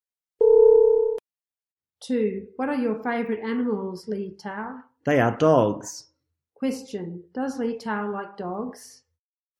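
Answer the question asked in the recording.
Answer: Yes, he does.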